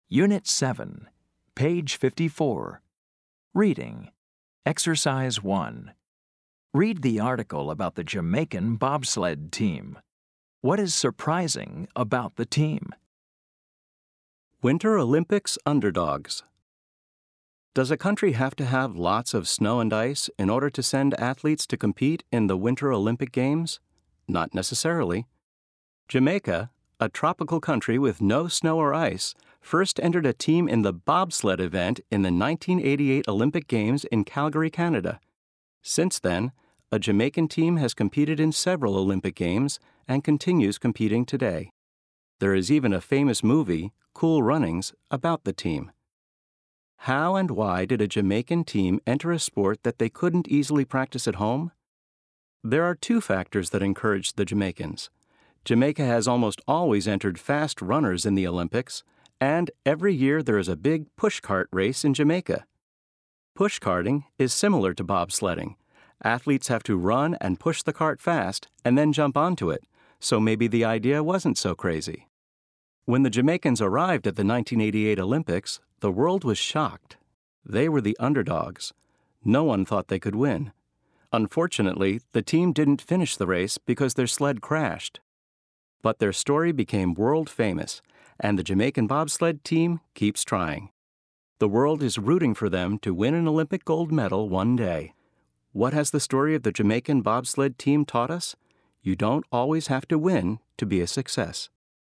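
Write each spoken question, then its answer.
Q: What is surprising about the team?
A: Jamaica is a tropical country with no snow or ice, yet it sends a bobsled team to the Winter Olympics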